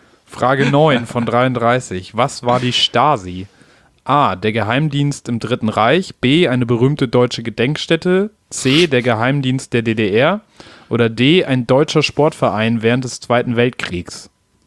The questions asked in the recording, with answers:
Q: Was war die Stasi?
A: Geheimdienst in der DDR.